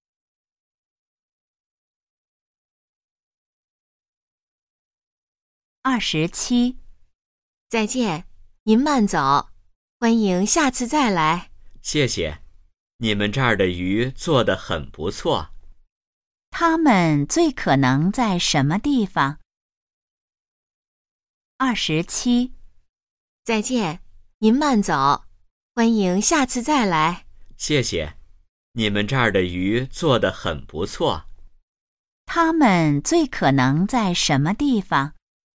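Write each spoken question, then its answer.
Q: 他们最可能在什么地方?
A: 饭馆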